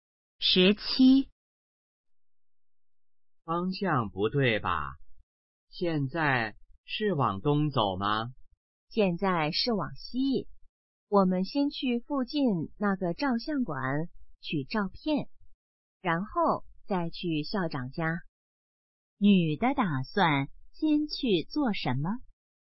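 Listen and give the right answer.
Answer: 去照相馆取照片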